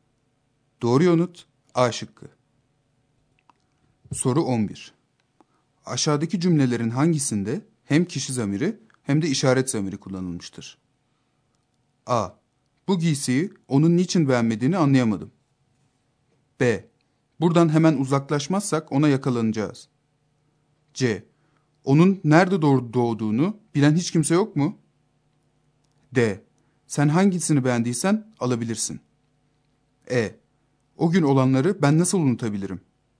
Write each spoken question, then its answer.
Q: Aşağıdaki cümlelerin hangisinde hem kişi zamiri hem de işaret zamiri kullanılmıştır?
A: Doğru yanıt B şıkkı.